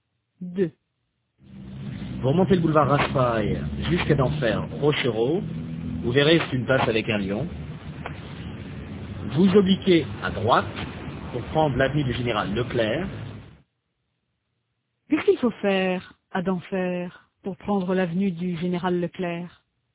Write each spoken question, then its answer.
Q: Qu'est-ce qu'il faut faire à Denfert pour prendre l'avenue du général Leclerc?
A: Il faut obliquer à droite.